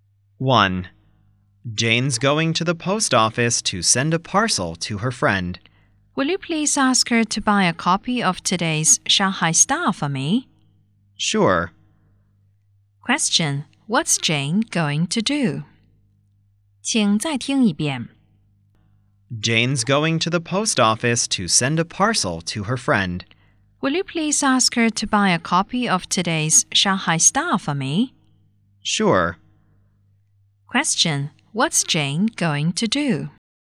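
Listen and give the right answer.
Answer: Go to the post office to send a parcel to her friend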